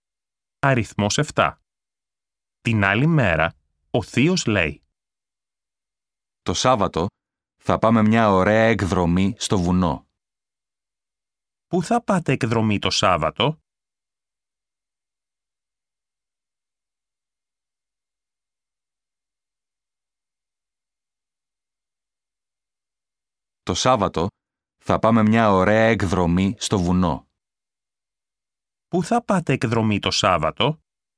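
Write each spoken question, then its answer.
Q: Πού θα πάτε εκδρομή το Σάββατο?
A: Στο βουνό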